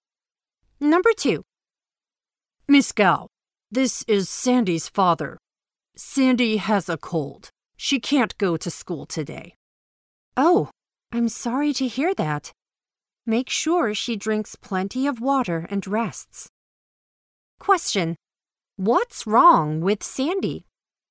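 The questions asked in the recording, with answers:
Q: What's wrong with Sandy?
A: She has a cold.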